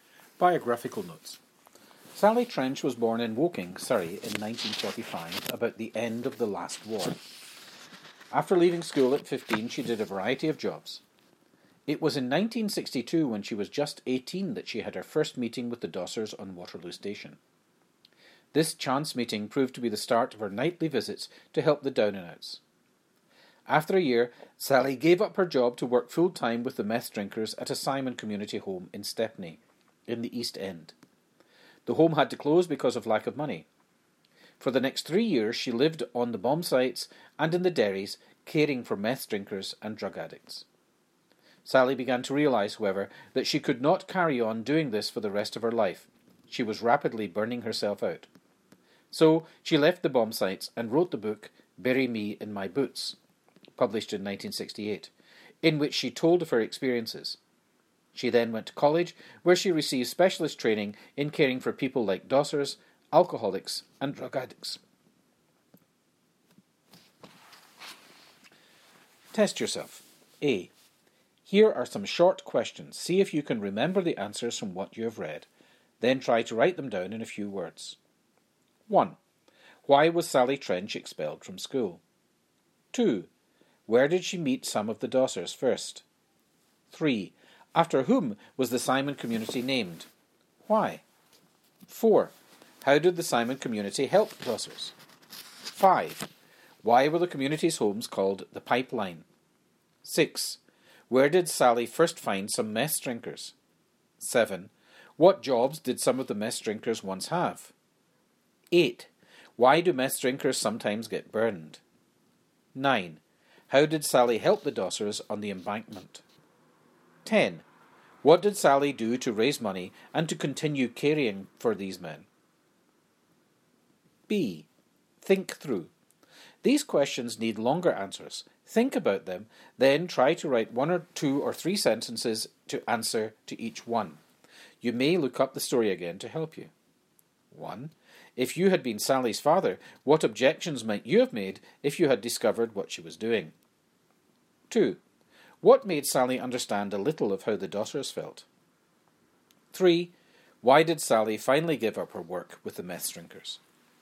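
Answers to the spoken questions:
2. On Waterloo Station
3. She realised she could not carry on for the rest of her life; she was rapidly burning herself out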